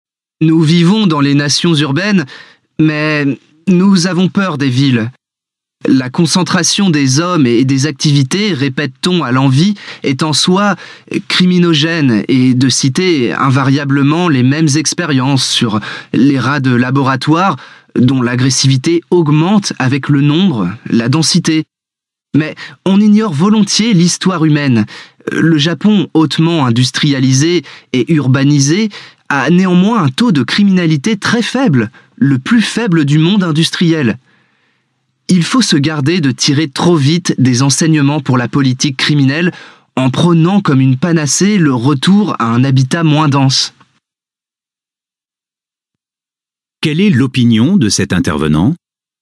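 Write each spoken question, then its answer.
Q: Quelle est l'opinion de cet intervenant ?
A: La concentration urbaine n'est pas en soi cause de criminalité (ex. le Japon) ; il ne faut pas prôner trop vite un habitat moins dense.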